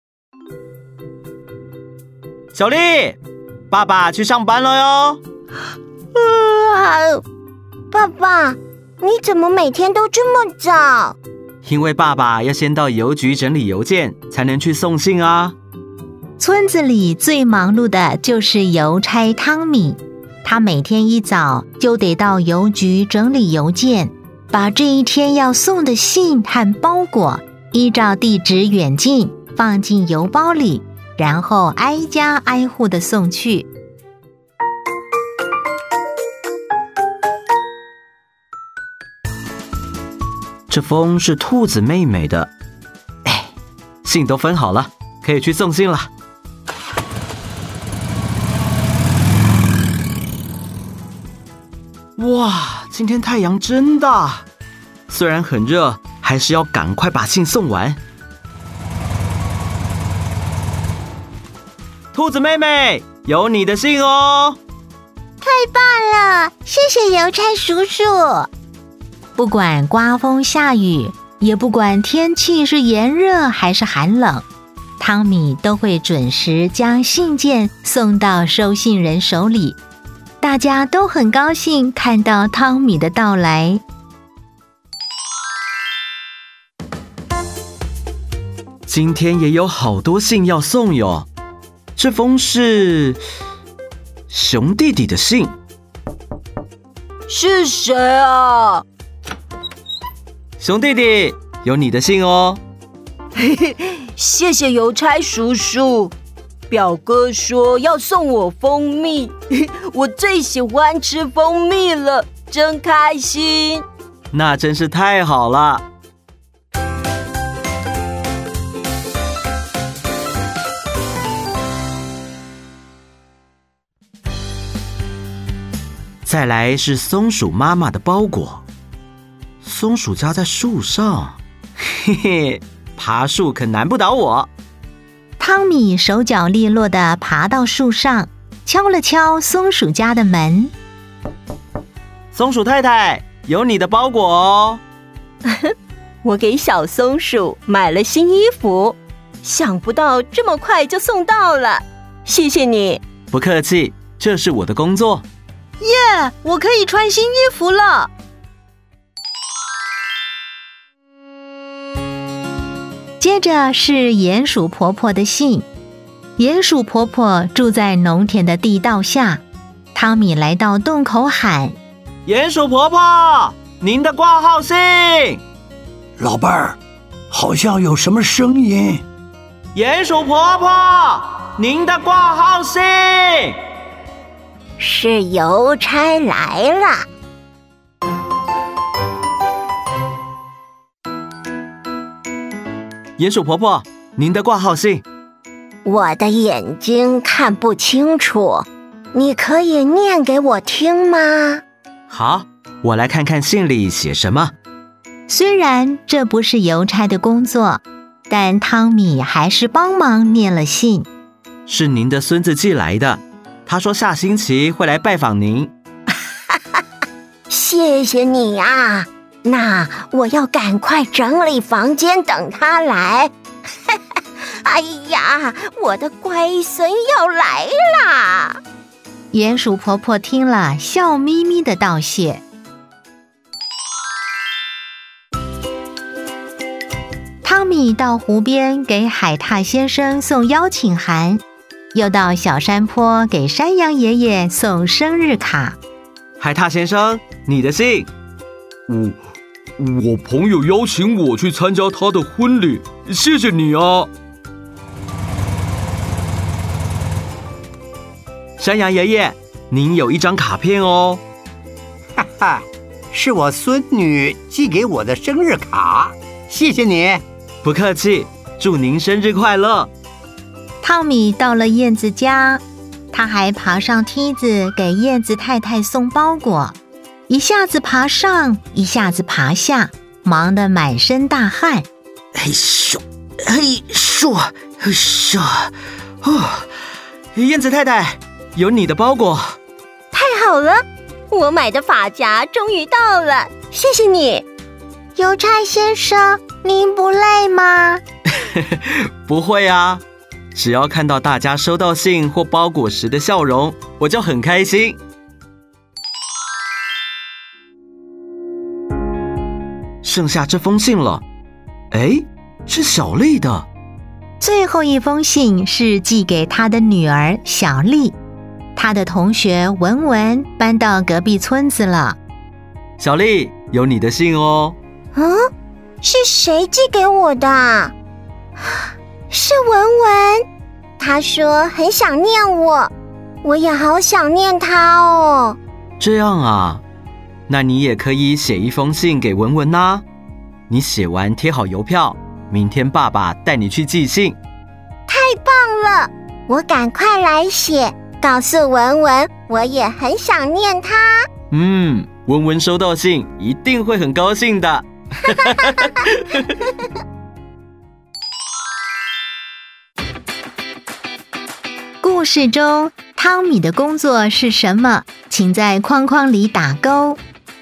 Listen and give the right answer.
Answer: 邮差,